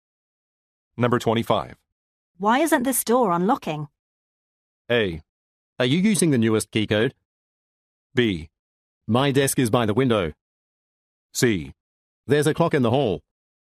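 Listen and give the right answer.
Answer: A: Are you using the newest key code?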